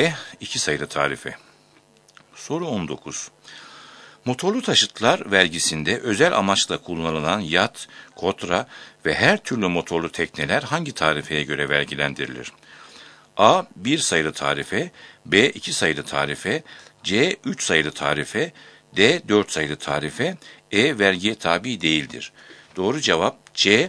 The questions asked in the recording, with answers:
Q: Motorlu taşıtlar vergisinde özel amaçla kullanılan yat, kotra ve her türlü motorlu tekneler hangi tarifeye göre vergilendirilir?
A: Doğru cevap C. 3 sayılı tarife.